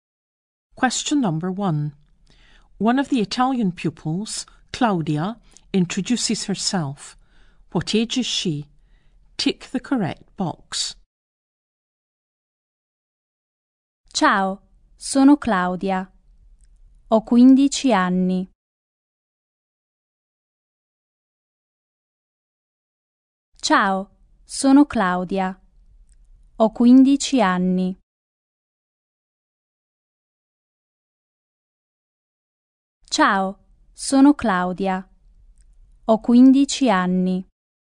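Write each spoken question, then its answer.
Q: What age is she?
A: 15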